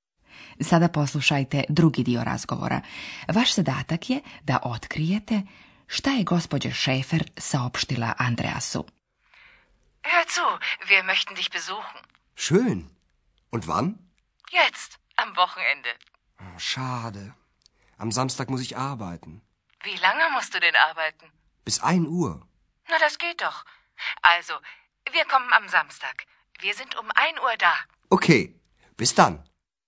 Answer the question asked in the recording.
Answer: Andreasova majka je saopštila svome sinu da će oni u subotu u 1 sat biti u Aachenu, to jest kod njega u hotelu.